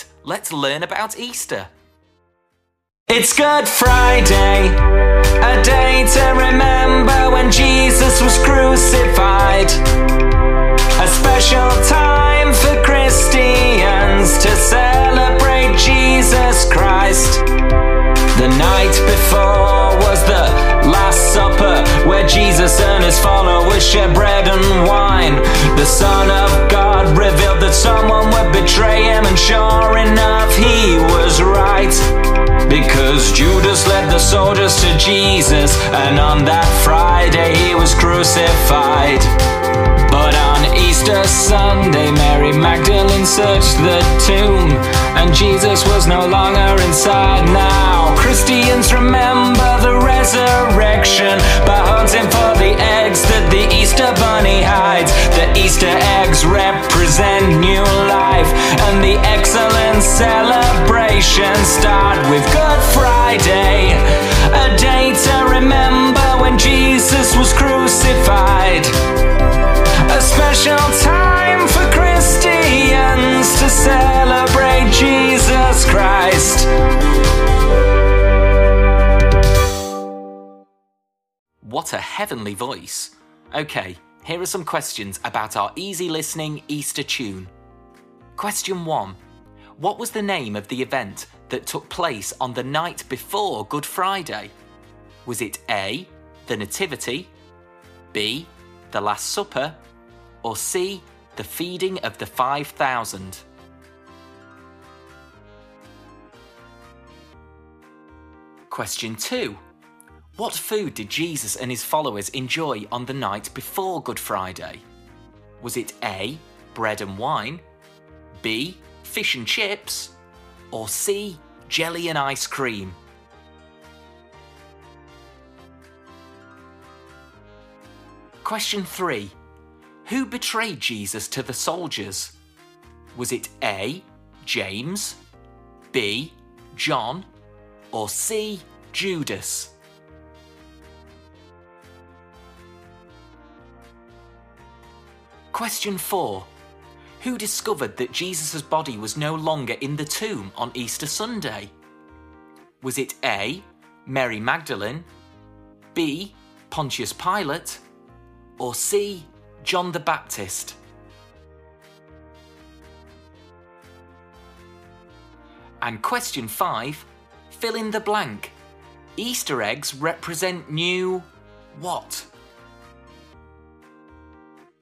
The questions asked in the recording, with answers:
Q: What was the name of the event that took place on the night before Good Friday?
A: So the answer is B, the Last Supper.

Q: what food did Jesus and his followers enjoy on the night before Good Friday?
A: The answer is A. Bread and wine.

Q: Who betrayed Jesus to the soldiers?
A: So the answer is C. Judas.

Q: Who discovered that Jesus' body was no longer in the tomb on Easter Sunday?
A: so the answer is A.

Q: Easter eggs represent new what?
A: And the answer is life.